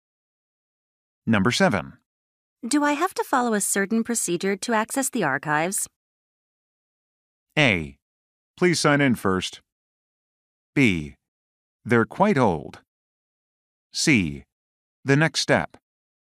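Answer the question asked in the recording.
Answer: A: Please sign in first.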